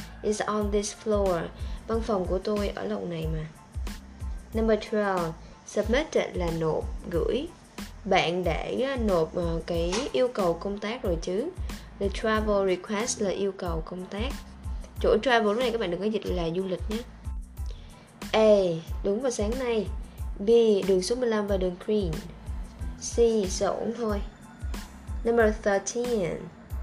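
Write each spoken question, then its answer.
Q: Bạn để nộp cái yêu cầu công tác rồi chứ.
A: A: Đúng vào sáng nay.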